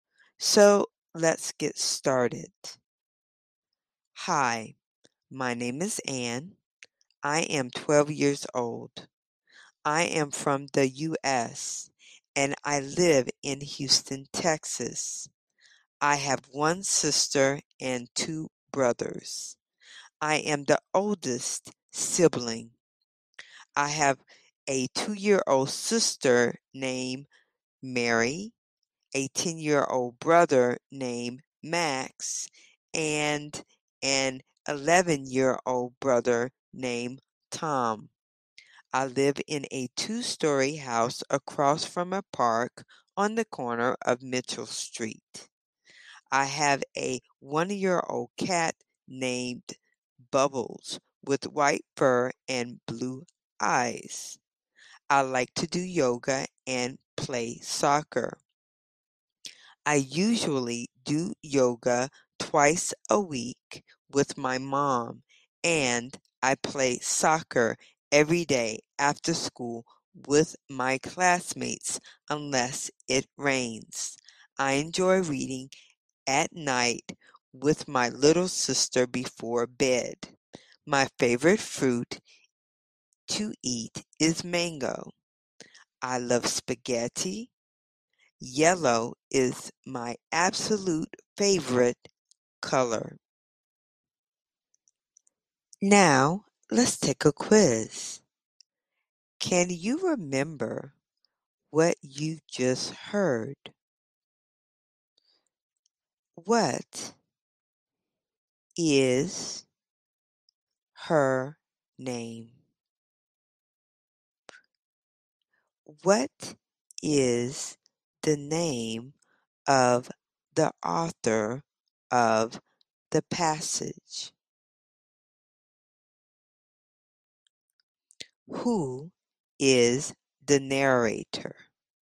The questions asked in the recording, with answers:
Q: What is her name?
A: her name is Anne.

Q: What is the name of the author of the passage?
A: The author is Anne.

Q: Who is the narrator?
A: The narrator is Anne.